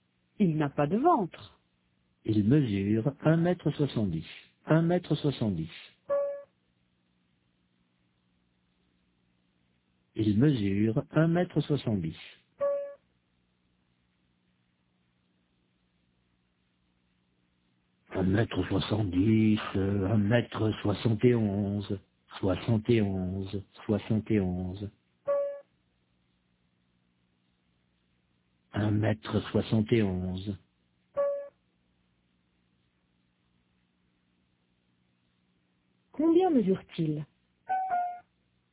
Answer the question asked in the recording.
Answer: Un mètre soixante-dix.